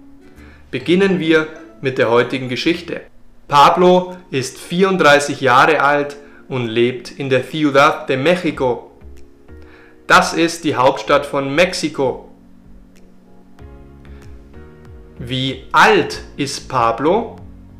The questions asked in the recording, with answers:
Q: Wie alt ist Pablo?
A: Pablo ist 34 Jahre alt.